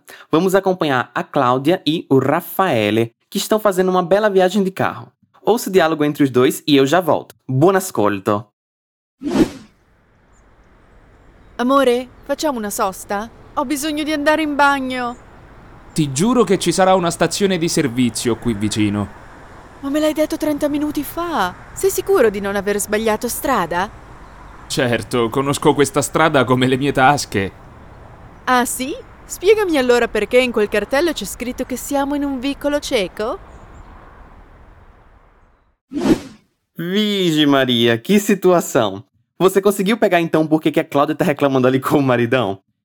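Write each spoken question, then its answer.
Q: Você conseguiu pegar então por que a Cláudia tá reclamando ali com o maridão?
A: Porque ela precisa ir ao banheiro, ele já tinha prometido uma parada há 30 minutos e uma placa diz que eles estão num beco sem saída (vicolo cieco).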